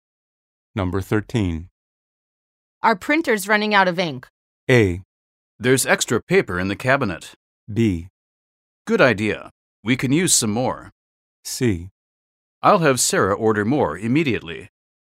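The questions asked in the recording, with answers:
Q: Our printer's running out of ink.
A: C: I'll have Sarah order more immediately.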